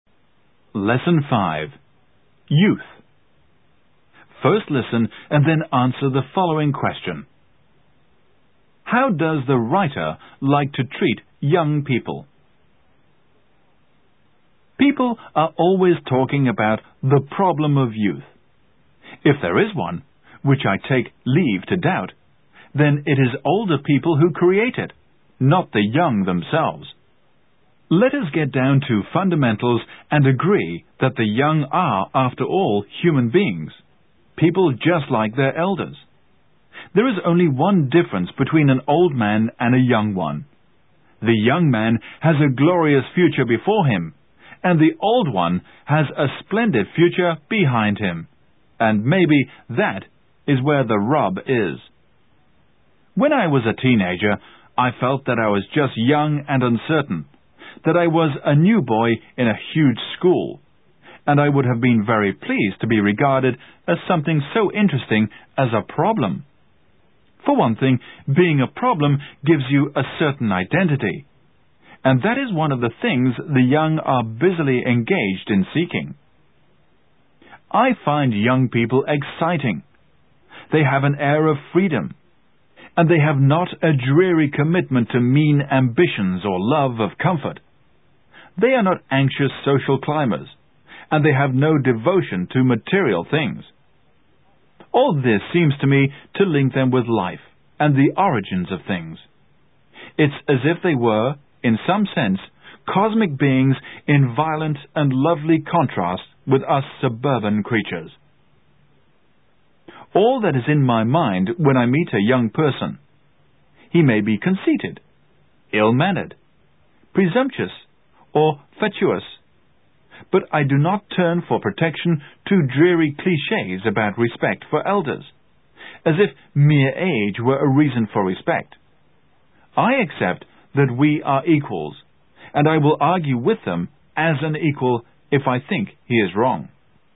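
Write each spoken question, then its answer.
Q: How does the writer like to treat young people?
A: As equals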